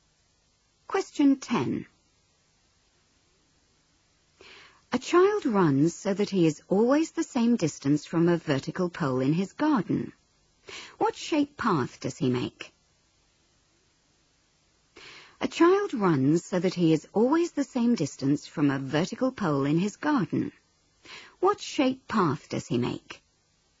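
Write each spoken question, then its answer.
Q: What shape path does he make?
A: A circle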